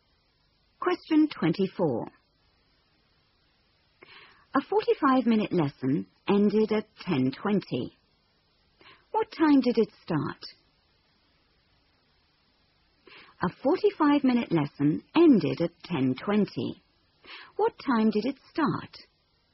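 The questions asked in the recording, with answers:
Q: What time did it start?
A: 9:35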